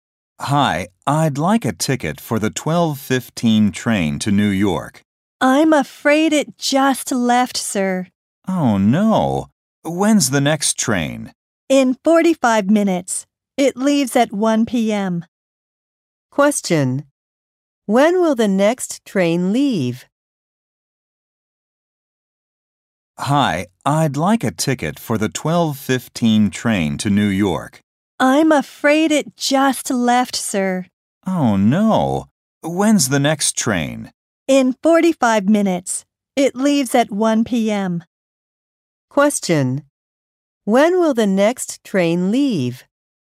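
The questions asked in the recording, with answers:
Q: When will the next train leave?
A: At 1 p.m.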